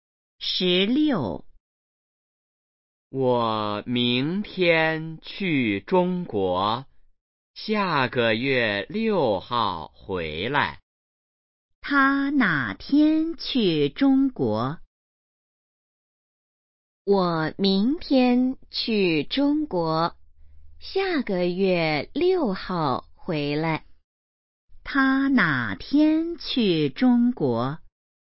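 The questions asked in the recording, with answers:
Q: 他哪天去中国?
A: 明天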